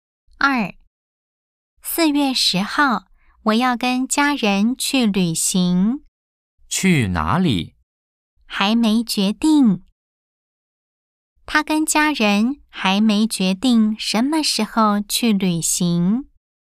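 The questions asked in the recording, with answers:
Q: 他跟家人还没决定什么时候去旅行。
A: X (false)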